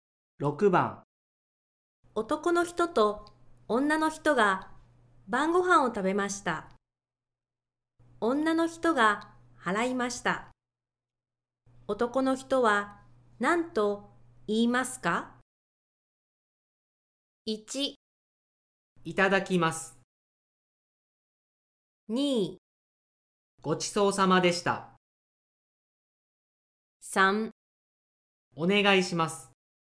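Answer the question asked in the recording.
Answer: 2: ごちそうさまでした。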